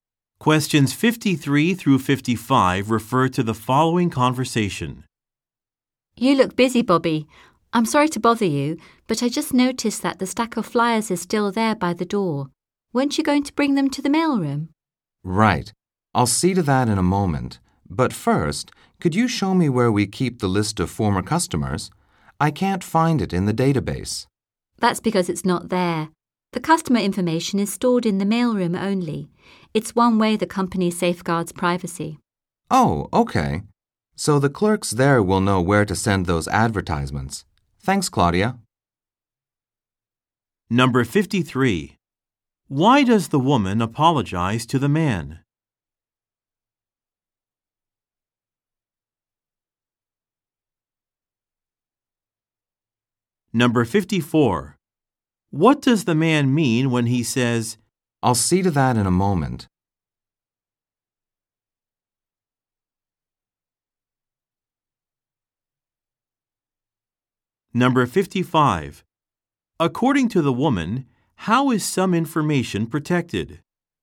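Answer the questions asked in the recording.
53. She is bothering him while he is busy
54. He will take the flyers to the mailroom soon
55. Customer information is stored only in the mailroom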